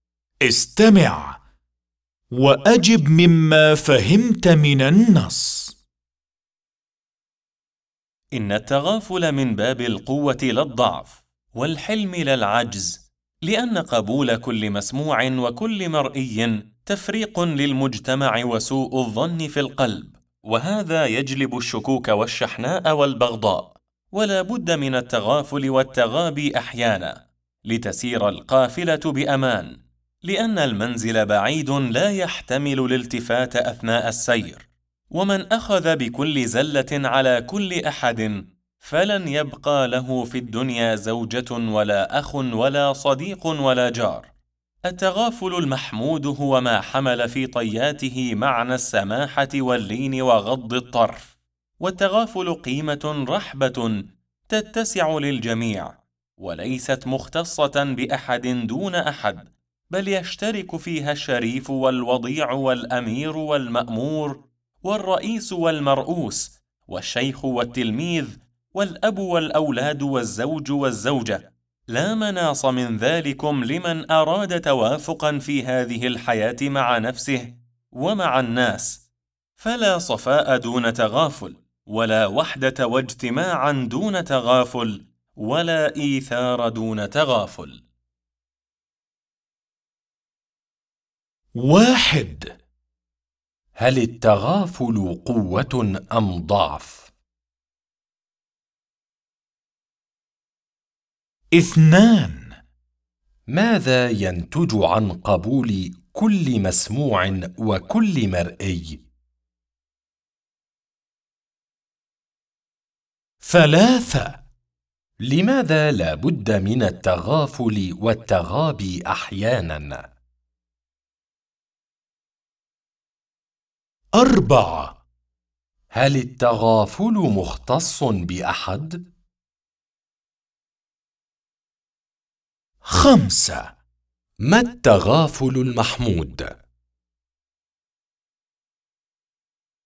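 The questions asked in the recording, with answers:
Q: هل التغافل قوة أم ضعف؟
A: قوة

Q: ماذا ينتج عن قبول كل مسموع وكل مرئي؟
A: تفريق للمجتمع وسوء الظن في القلب، ويجلب الشكوك والشحناء والبغضاء

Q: لماذا لا بد من التغافل والتغابي أحياناً؟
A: لتسير القافلة بأمان، لأن المنزل بعيد لا يحتمل الالتفات أثناء السير

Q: هل التغافل مختص بأحد؟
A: لا، يتسع للجميع ويشترك فيه الجميع

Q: ما التغافل المحمود؟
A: ما حمل في طياته معنى السماحة واللين وغض الطرف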